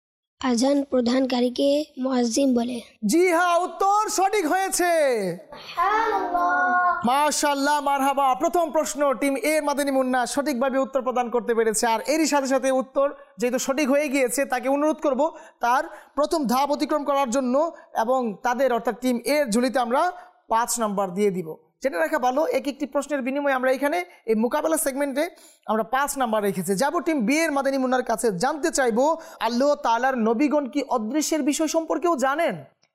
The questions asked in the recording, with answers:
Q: আল্লাহ তাআলার নবীগণ কি অদৃশ্যের বিষয় সম্পর্কেও জানেন?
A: জি হ্যাঁ, আল্লাহ তাআলার নবীগণ অদৃশ্যের বিষয় সম্পর্কেও জানেন।